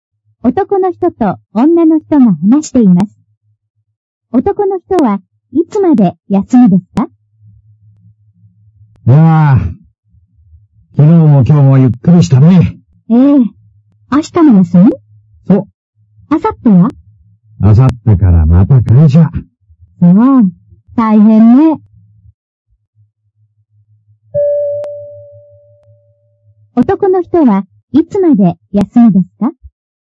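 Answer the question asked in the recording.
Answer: 明日まで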